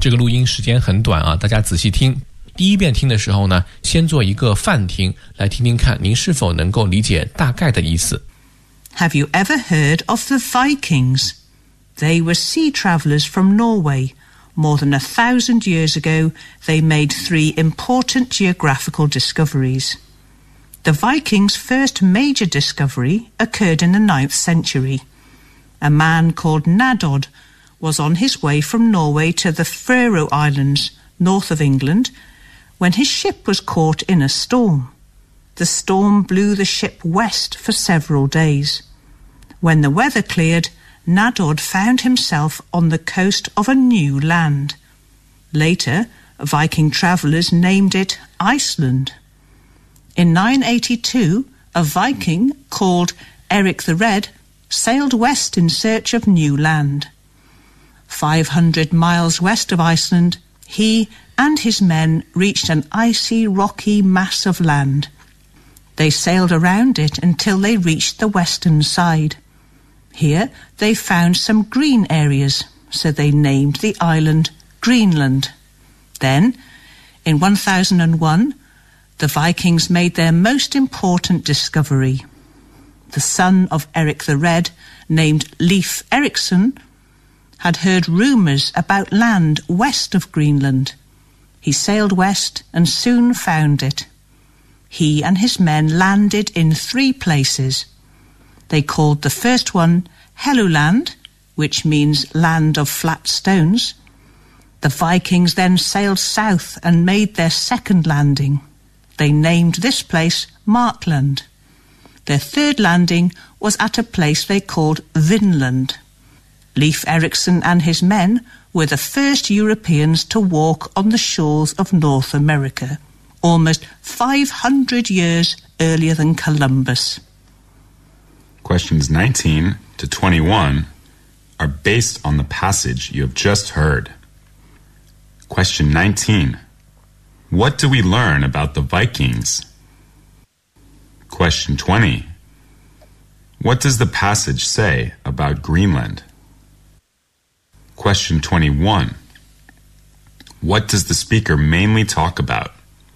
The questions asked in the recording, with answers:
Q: What does the speaker mainly talk about?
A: the speaker mainly introduces how the three most geographical discoveries were made by the Vikings.